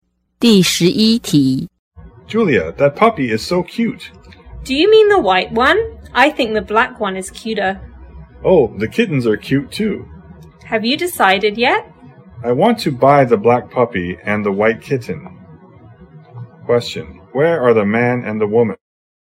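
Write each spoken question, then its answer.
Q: where are the man and the woman?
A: At a pet shop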